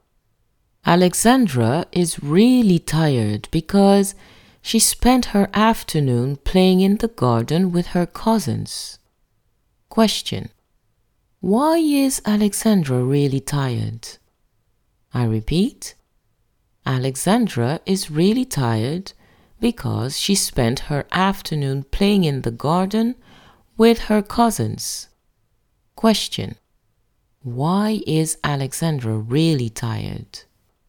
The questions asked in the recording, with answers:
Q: why is Alexandra really tired?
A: Alexandra is really tired because she spent her afternoon playing in the garden with her cousins.